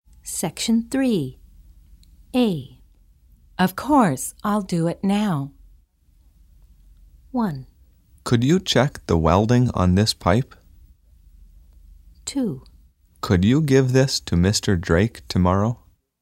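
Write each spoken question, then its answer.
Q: Of course, I'll do it now.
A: 1: Could you check the welding on this pipe?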